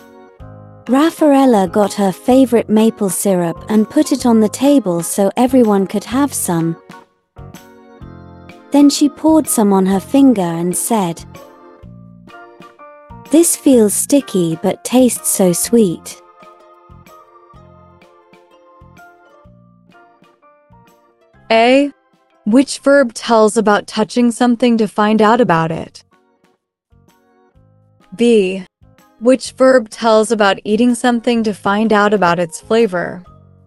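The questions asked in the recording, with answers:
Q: Which verb tells about touching something to find out about it?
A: feels

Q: Which verb tells about eating something to find out about its flavor?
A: tastes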